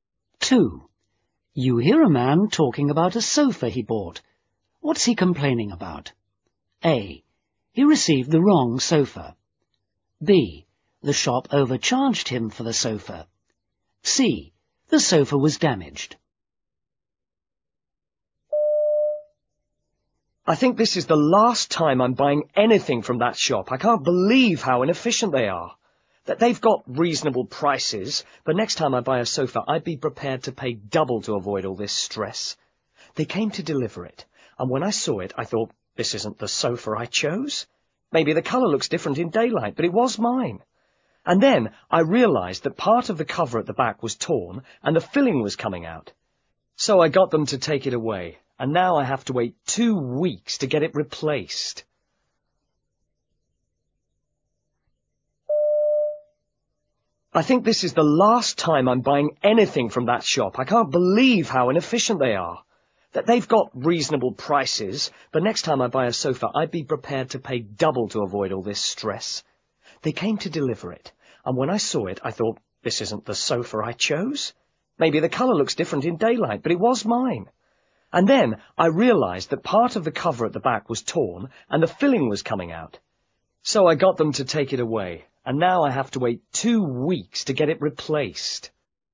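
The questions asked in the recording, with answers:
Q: What's he complaining about?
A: C: The sofa was damaged.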